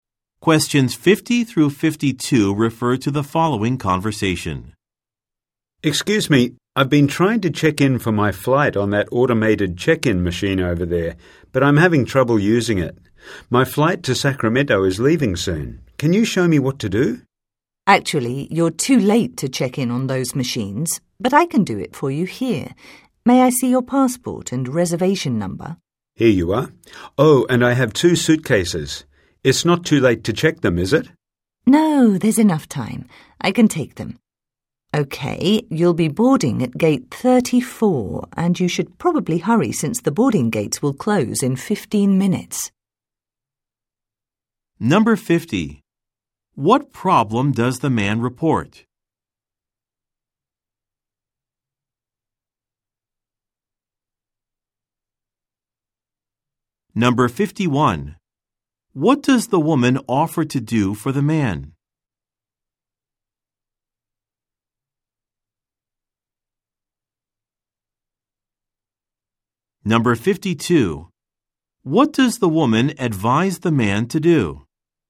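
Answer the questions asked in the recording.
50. He is having trouble using the automated check-in machine.
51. Check him in for his flight herself, at the counter.
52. Hurry to gate 34, since the boarding gates close in 15 minutes.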